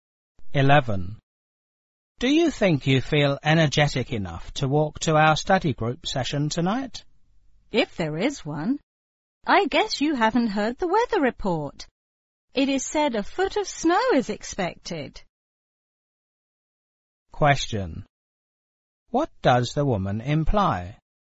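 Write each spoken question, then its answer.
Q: What does the woman imply?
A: The study group session may be canceled because of heavy snow.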